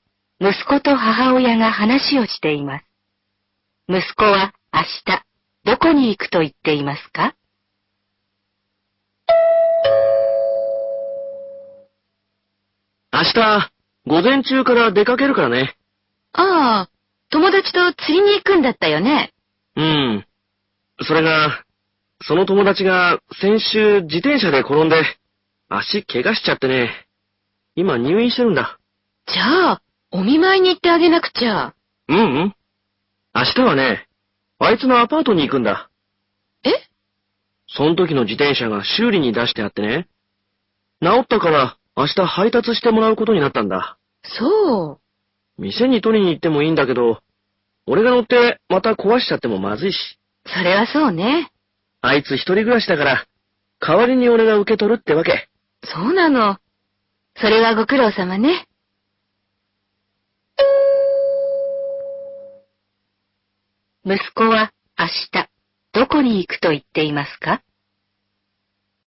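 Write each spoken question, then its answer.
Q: 息子は明日、どこに行くと言っていますか?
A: 友達のアパート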